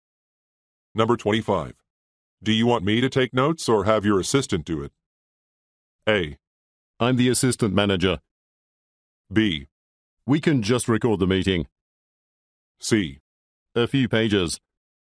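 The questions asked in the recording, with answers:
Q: Do you want me to take notes or have your assistant do it?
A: B: We can just record the meeting.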